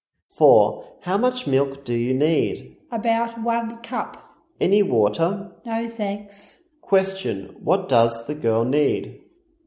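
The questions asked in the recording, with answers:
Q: What does the girl need?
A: About 1 cup of milk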